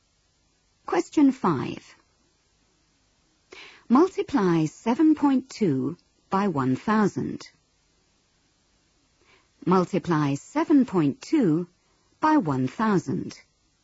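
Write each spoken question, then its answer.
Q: Multiply 7.2 by 1,000.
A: 7200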